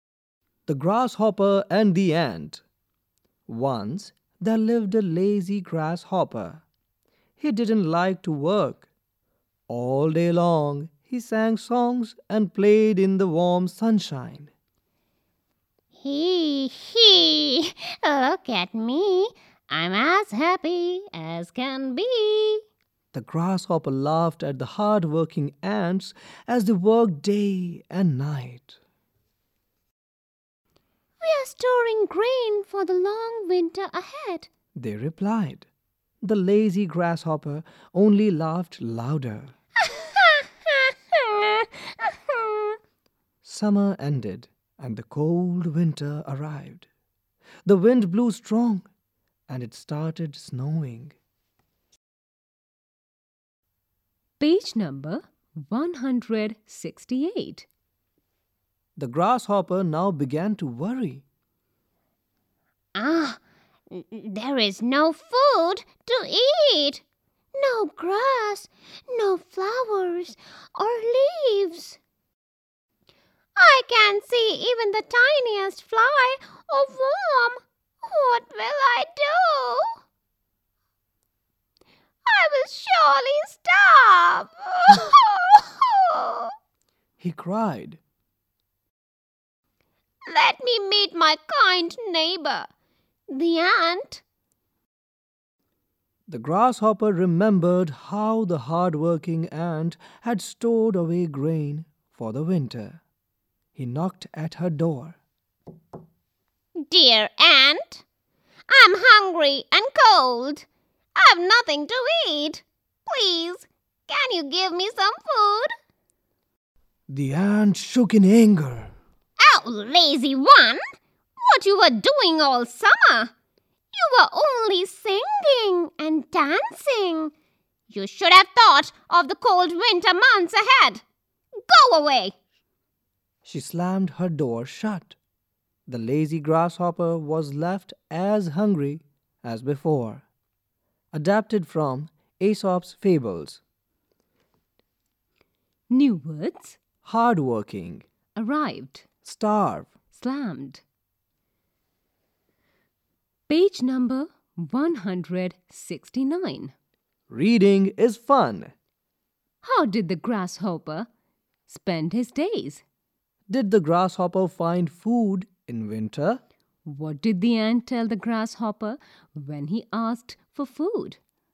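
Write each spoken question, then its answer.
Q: How did the grasshopper spend his days?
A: He sang songs and played in the warm sunshine all day long.

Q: Did the grasshopper find food in winter?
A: No

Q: What did the ant tell the grasshopper when he asked for food?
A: She called him lazy, said he had only sung and danced all summer and should have thought of winter, and told him to go away.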